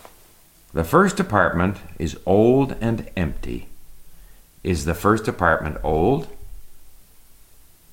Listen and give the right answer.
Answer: Yes, the first apartment is old and empty.